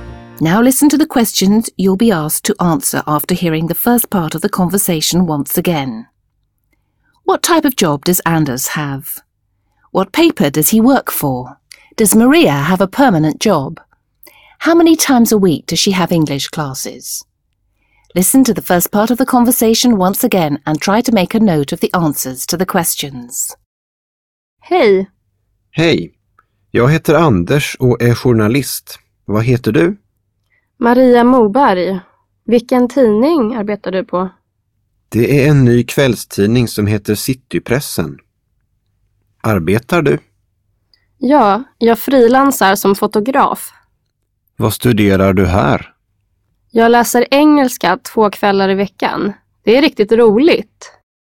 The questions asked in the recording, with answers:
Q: What type of job does Anders have?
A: Anders is a journalist.

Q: What paper does he work for?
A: The paper Anders works for is a new evening paper called Citypressen.

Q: Does Maria have a permanent job?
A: Maria doesn't have a permanent job.

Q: How many times a week does she have English classes?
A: Twice a week.